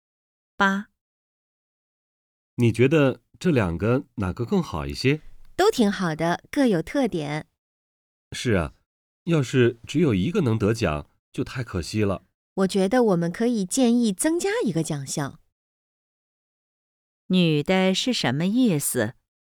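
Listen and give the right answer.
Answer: 建议增加一个奖项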